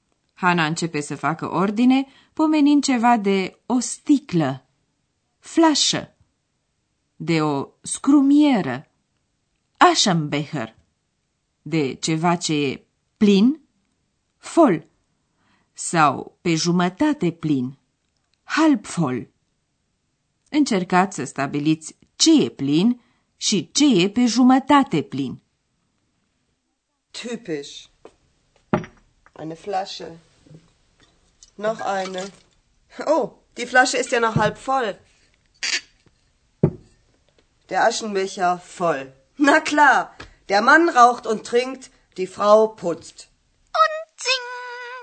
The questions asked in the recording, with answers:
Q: Încercați să stabiliți ce e plin și ce e pe jumătate plin.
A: Așadar, scrumiera e plină, iar o sticlă de vin e pe jumătate plină.